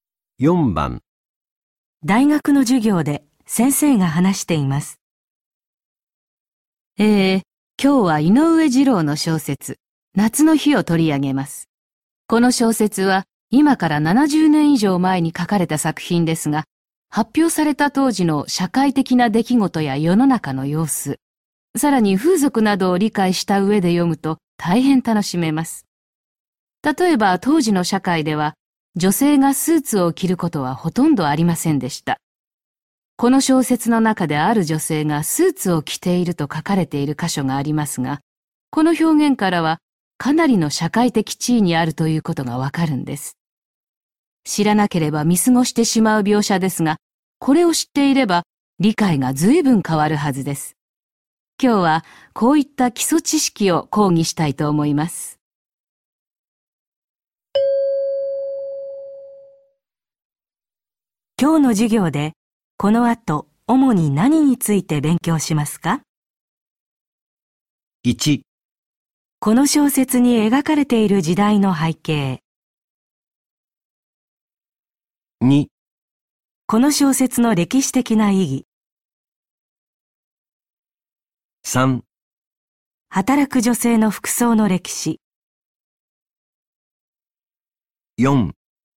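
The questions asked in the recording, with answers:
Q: 今日の授業でこの後主に何について勉強しますか?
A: 1: この小説に描かれている時代の背景。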